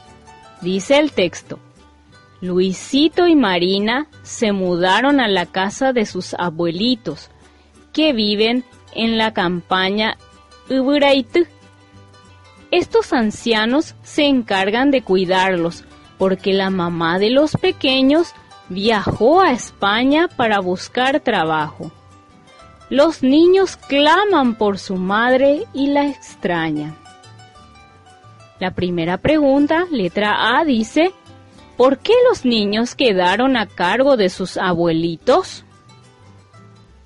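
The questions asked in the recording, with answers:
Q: ¿por qué los niños quedaron a cargo de sus abuelitos?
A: Porque su mamá viajó a España para buscar trabajo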